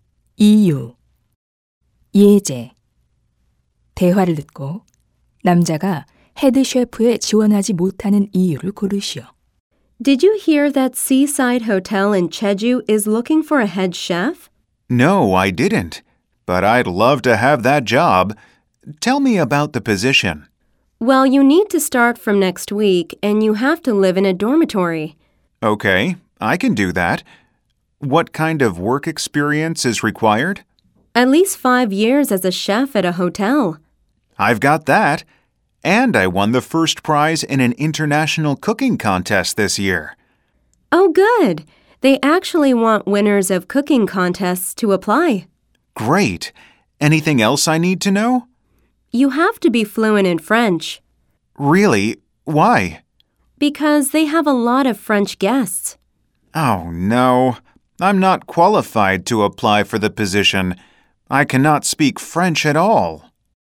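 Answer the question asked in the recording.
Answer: 프랑스어를 전혀 못해서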